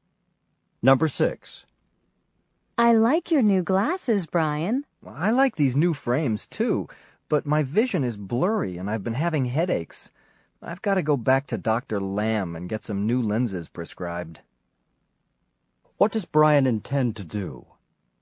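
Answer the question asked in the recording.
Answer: Go back to Dr. Lamb to get new lenses prescribed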